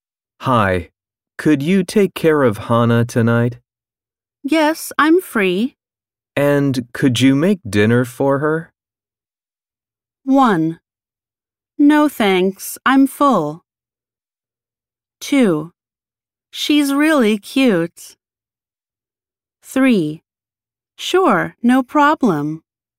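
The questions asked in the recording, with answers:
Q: And could you make dinner for her?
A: 3: Sure, no problem.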